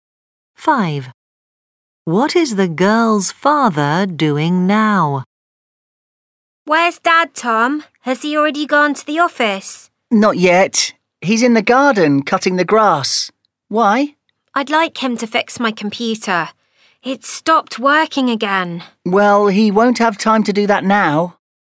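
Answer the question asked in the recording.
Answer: cutting the grass in the garden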